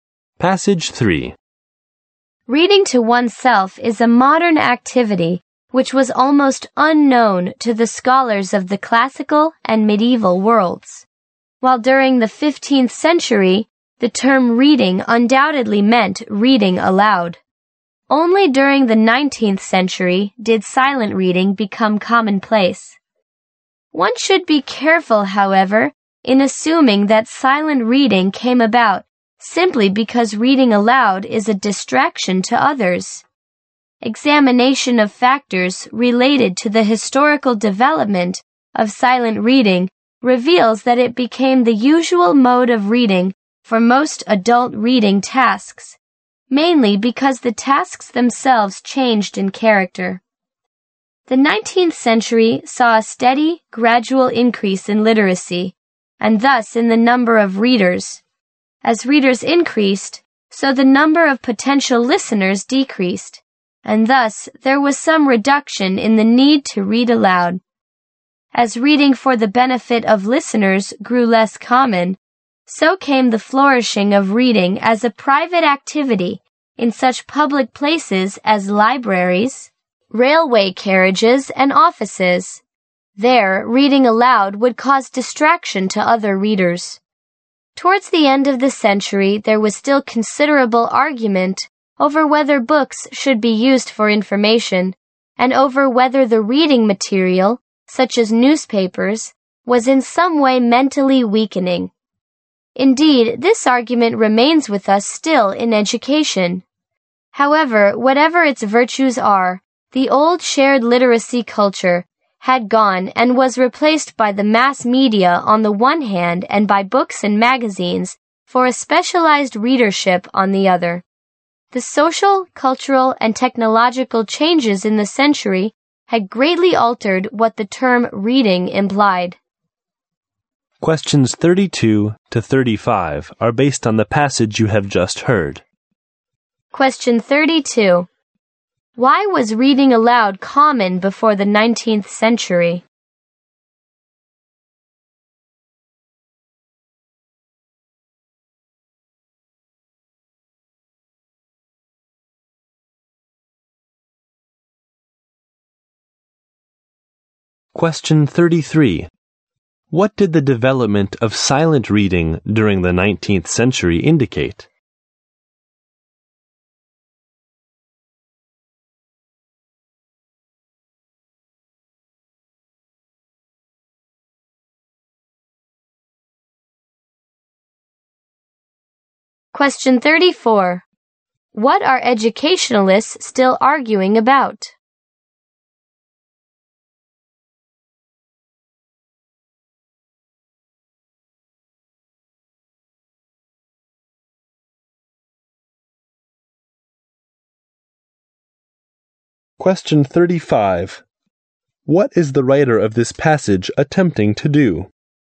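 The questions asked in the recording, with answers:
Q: What did the development of silent reading during the 19th century indicate?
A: That the nature of reading tasks had changed.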